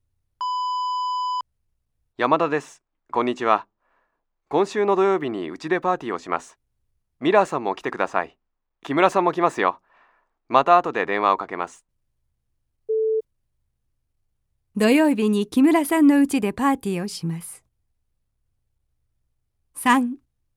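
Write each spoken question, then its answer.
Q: 土曜日に木村さんのうちでパーティーをします。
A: ×(山田さんのうちでパーティーをします)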